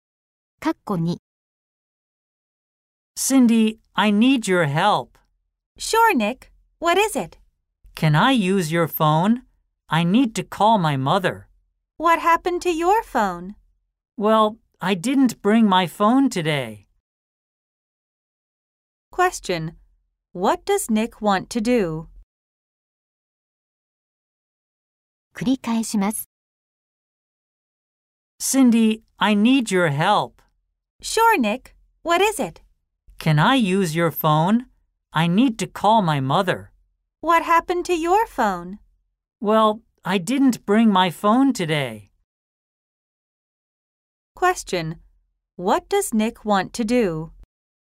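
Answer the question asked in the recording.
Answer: He wants to use Cindy's phone to call his mother.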